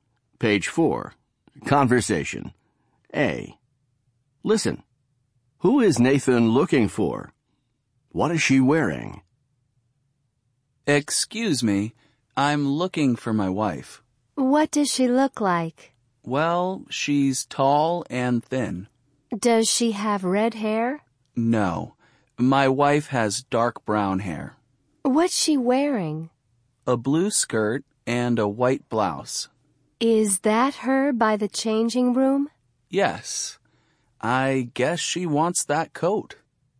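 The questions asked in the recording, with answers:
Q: Who is Nathan looking for?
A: His wife

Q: What is she wearing?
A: A blue skirt and a white blouse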